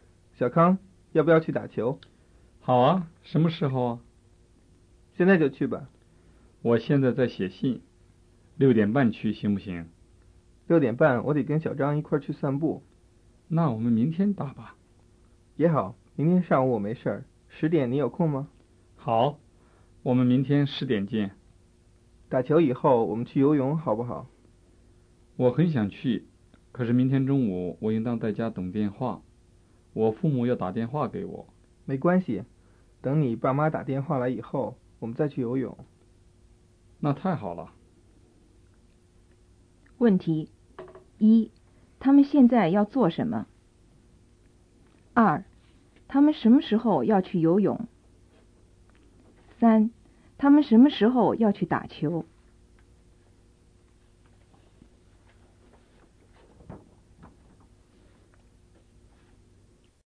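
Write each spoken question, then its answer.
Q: 他们什么时候要去游泳?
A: 明天打球以后,等父母打电话以后

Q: 他们什么时候要去打球?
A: 明天上午10:00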